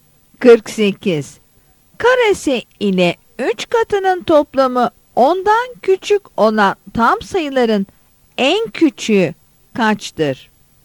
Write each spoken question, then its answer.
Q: Karesi ile 3 katının toplamı 10'dan küçük olan tam sayıların en küçüğü kaçtır?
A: Yanıt B'dir.